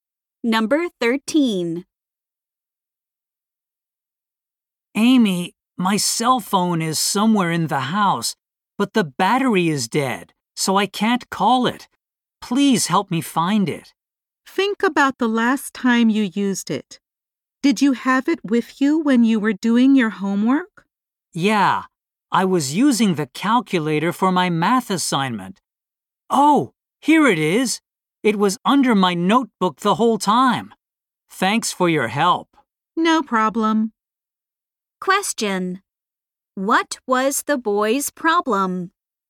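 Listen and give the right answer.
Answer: He couldn't find his cell phone.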